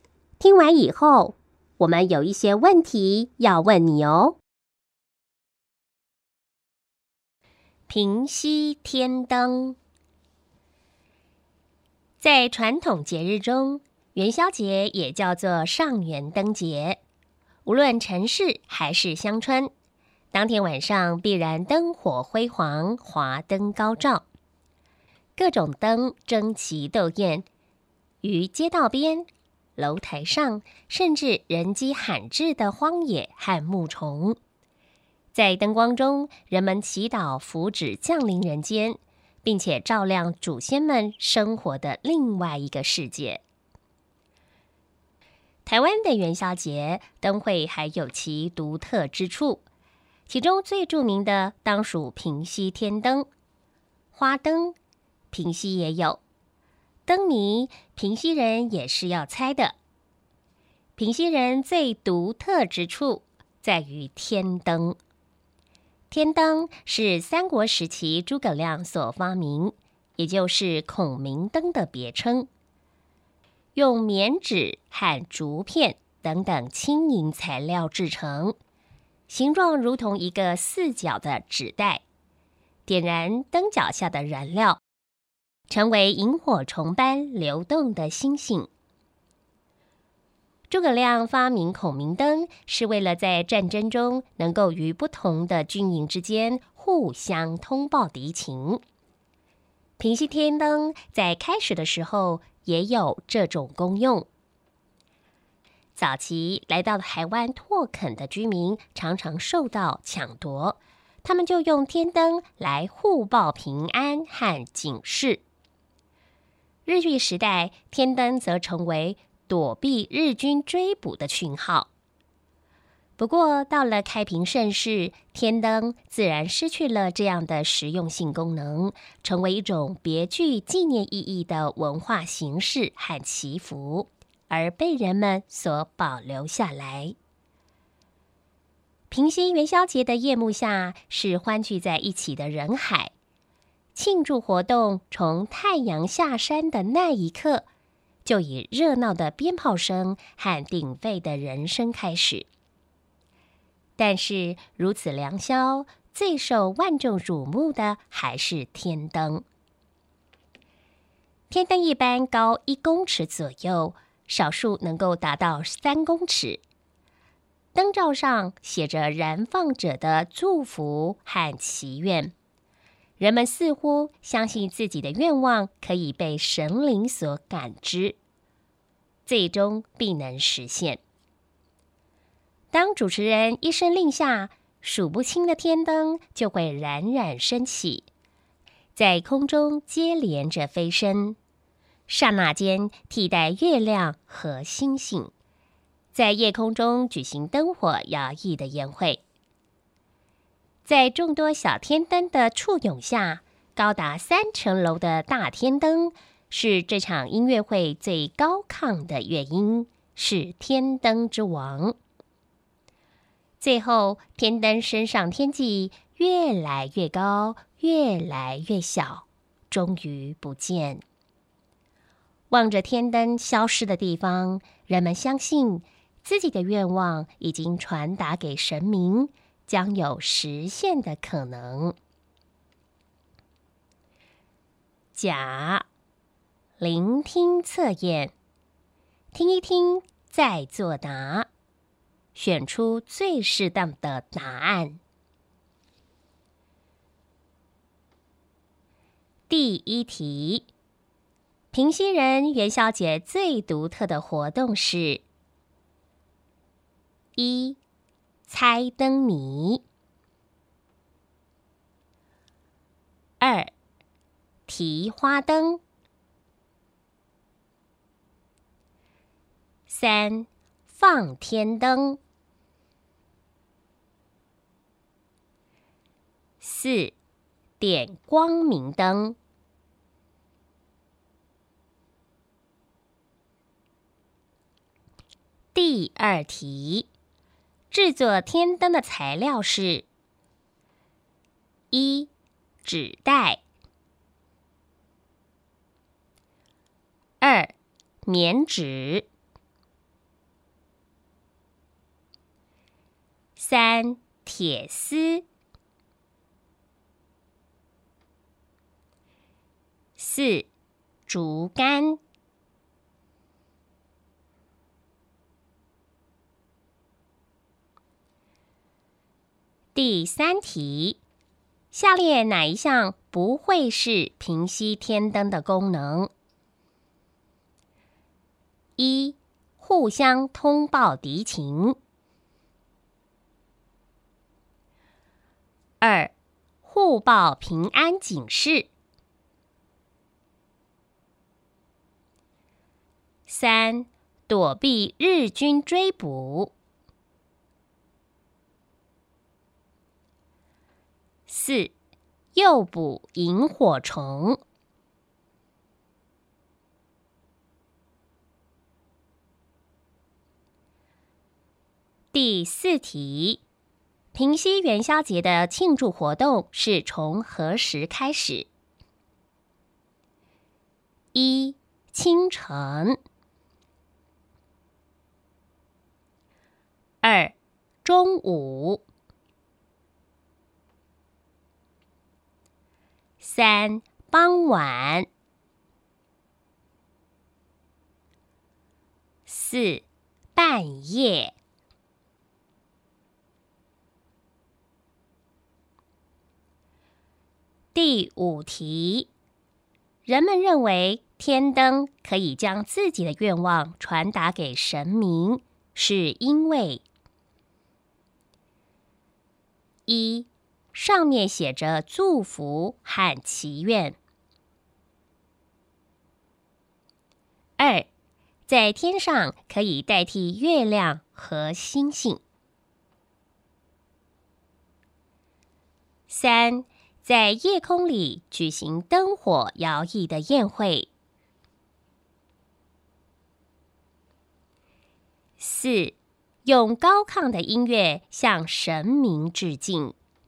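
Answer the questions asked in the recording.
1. 三:放天灯
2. 二:棉纸
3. 四:诱捕萤火虫
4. 三:傍晚
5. 一:上面写着祝福和祈愿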